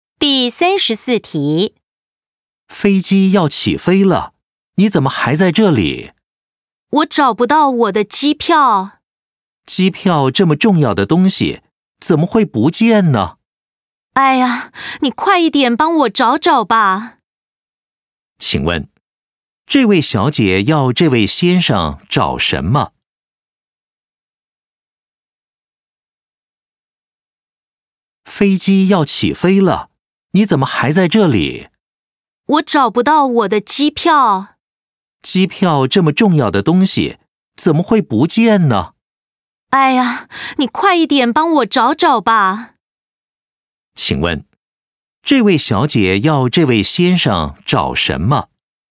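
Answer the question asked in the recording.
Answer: 机票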